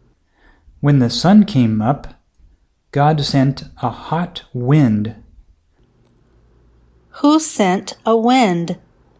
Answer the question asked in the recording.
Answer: God sent a wind.